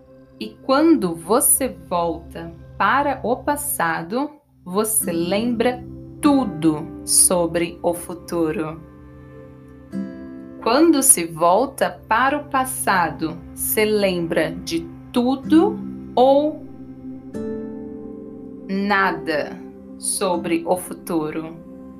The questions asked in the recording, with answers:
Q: Quando se volta para o passado, se lembra de tudo ou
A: tudo, se lembra de tudo sobre o futuro quando se volta para o passado.